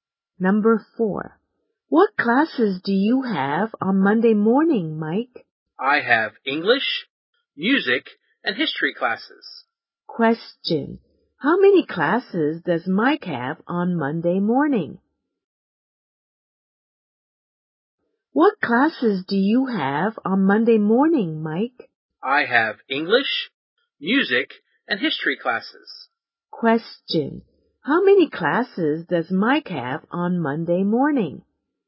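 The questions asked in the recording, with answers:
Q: how many classes does Mike have on Monday morning?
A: Three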